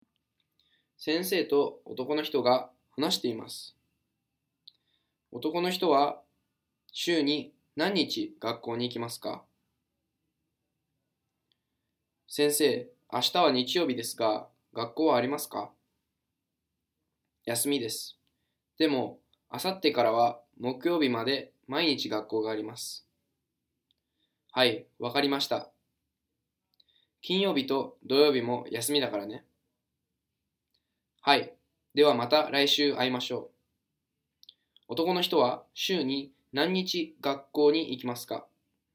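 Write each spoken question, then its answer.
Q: 男の人は週に何日学校に行きますか?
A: 4日(月曜日から木曜日まで)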